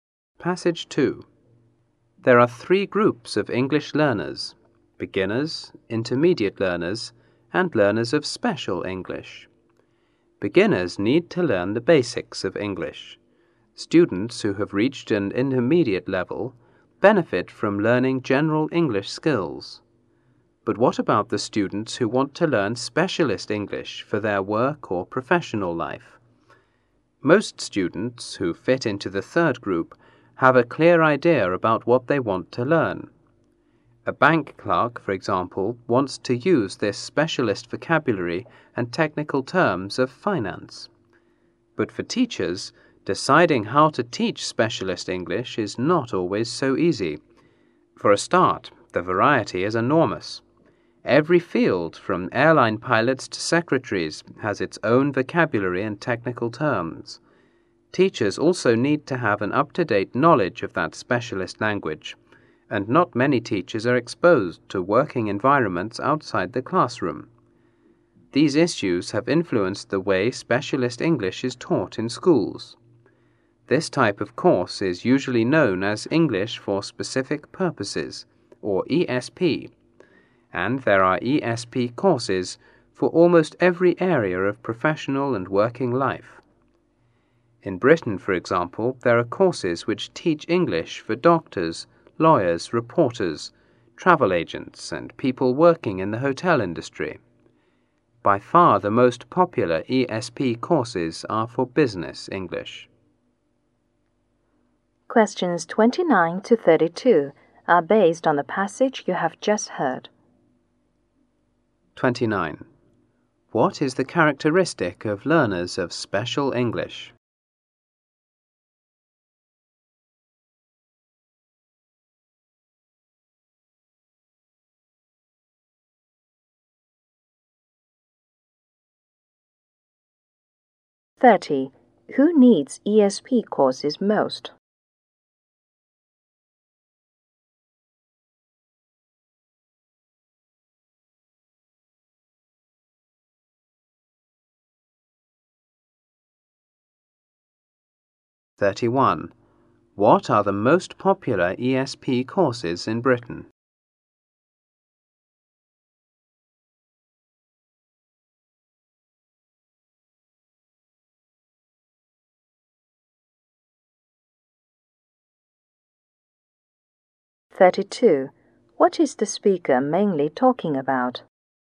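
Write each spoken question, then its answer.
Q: What is the characteristic of learners of special English?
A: They have a clear idea about what they want to learn

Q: What are the most popular ESP courses in Britain?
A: Business English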